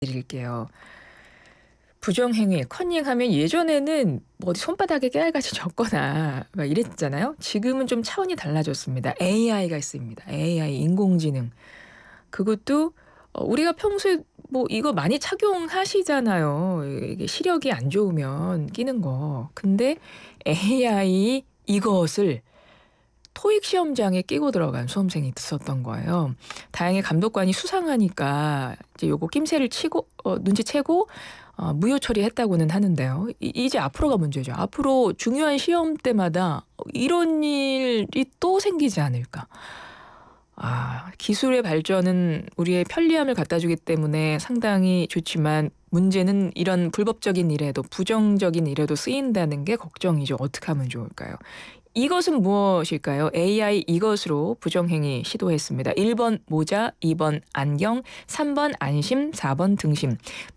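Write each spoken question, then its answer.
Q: 이것은 무엇일까요? AI 이것으로 부정행위 시도했습니다.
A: 2: 안경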